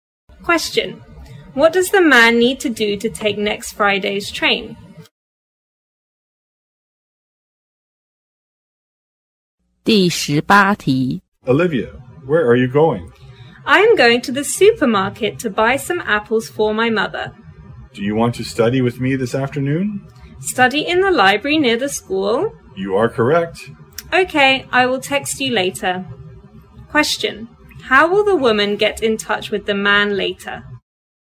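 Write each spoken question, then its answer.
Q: how will the woman get in touch with the man later?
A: By texting him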